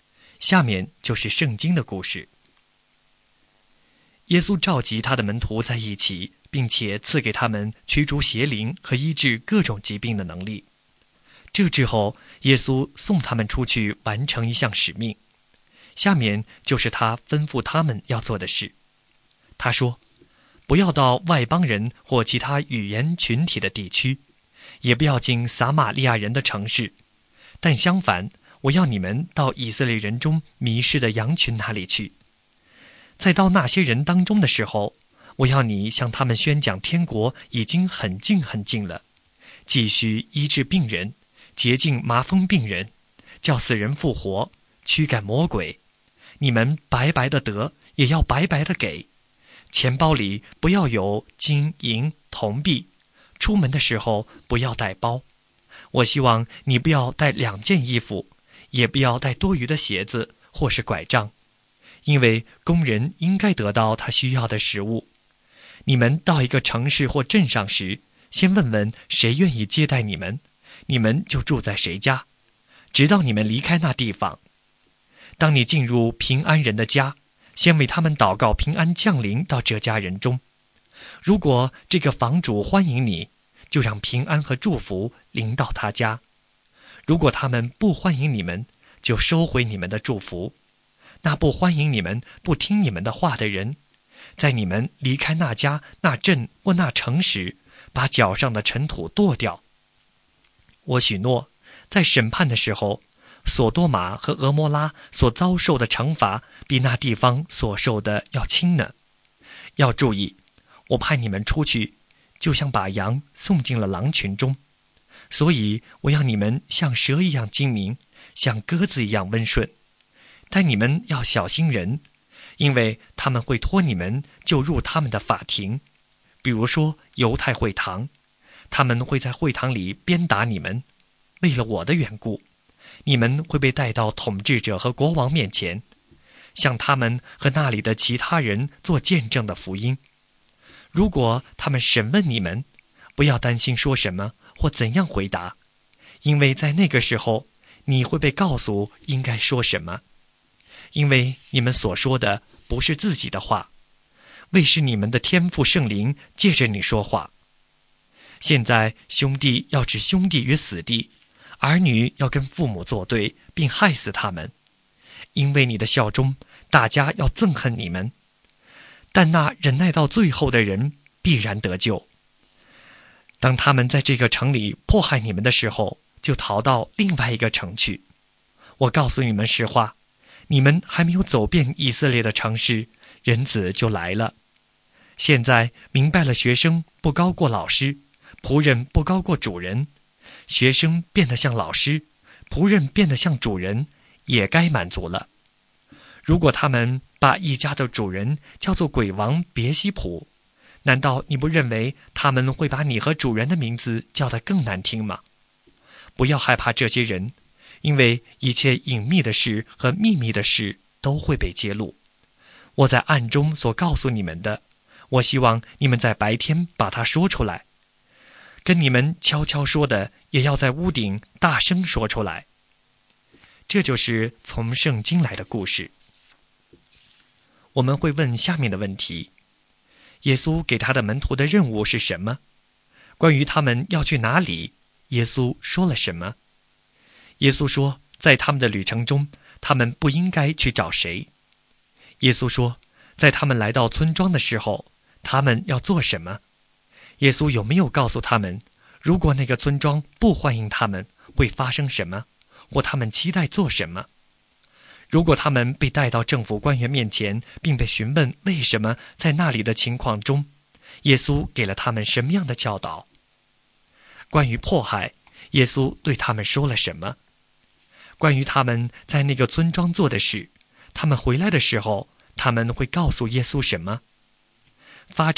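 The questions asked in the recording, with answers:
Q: 耶稣给他的门徒的任务是什么?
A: 到以色列人中迷失的羊群那里去,宣讲天国近了,医治病人,洁净麻风病人,叫死人复活,驱赶魔鬼

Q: 关于他们要去哪里,耶稣说了什么?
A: 不要去外邦人地区或撒玛利亚人的城市,要到以色列人中迷失的羊群那里去

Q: 耶稣说,在他们来到村庄的时候,他们要做什么?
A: 先问谁愿意接待他们,住在那家直到离开,并为那家祷告平安

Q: 耶稣有没有告诉他们,如果那个村庄不欢迎他们,会发生什么,或他们期待做什么?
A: 有,要收回祝福,离开时把脚上的尘土跺掉;审判时那地方受的惩罚比索多玛和俄摩拉更重

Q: 如果他们被带到政府官员面前,并被询问为什么在那里的情况中, 耶稣给了他们什么样的教导?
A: 不要担心说什么,到时天父的圣灵会借着他们说话

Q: 关于迫害,耶稣对他们说了什么?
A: 在一个城里受迫害就逃到另一个城去;忍耐到底的人必然得救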